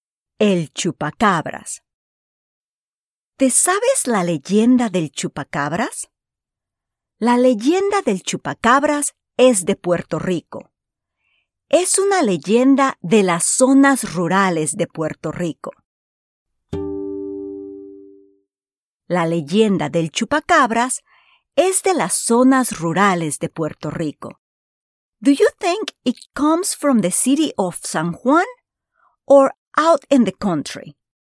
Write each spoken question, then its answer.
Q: Do you think it comes from the city of San Juan? or out in the country.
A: Muy bien. Out in the country.